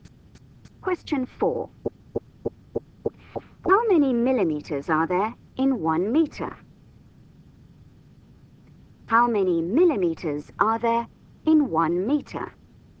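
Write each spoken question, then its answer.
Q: How many millimeters are there in 1 meter?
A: 1,000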